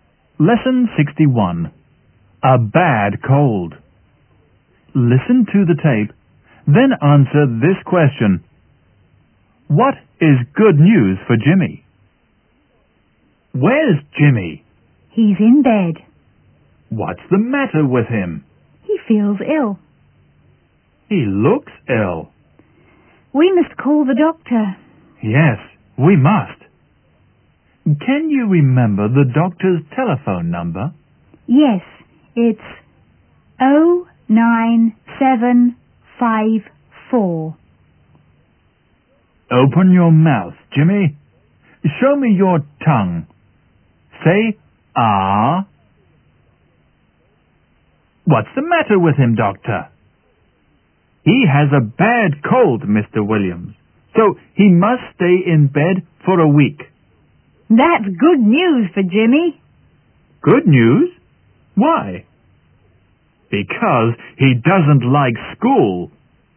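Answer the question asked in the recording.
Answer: He must stay in bed for a week, so he can't go to school (he doesn't like school).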